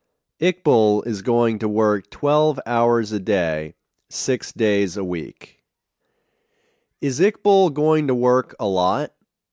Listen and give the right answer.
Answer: Yes, he is going to work a lot.